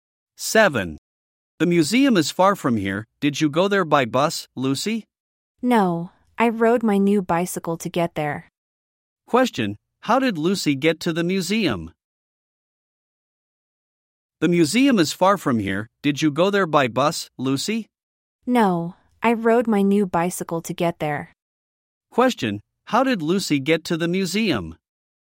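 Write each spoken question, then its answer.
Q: Question, how did Lucy get to the museum?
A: She rode her new bicycle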